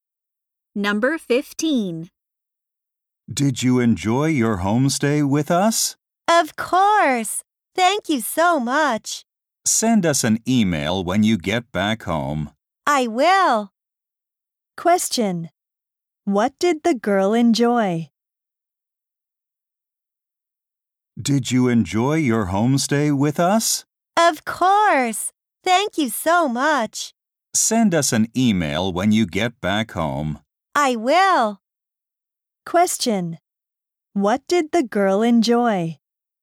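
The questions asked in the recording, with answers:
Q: What did the girl enjoy?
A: Her homestay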